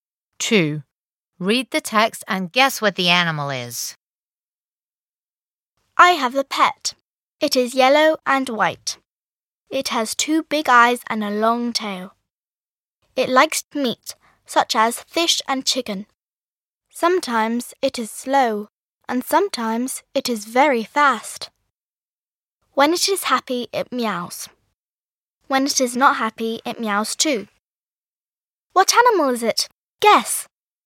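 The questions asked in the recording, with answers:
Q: What animal is it? Guess!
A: A cat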